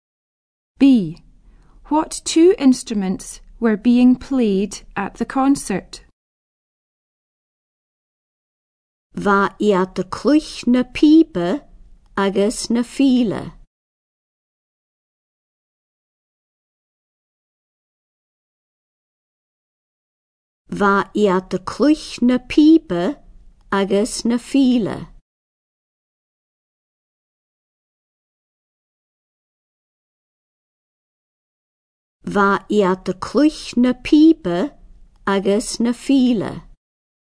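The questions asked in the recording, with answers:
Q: What two instruments were being played at the concert?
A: Pipes and fiddle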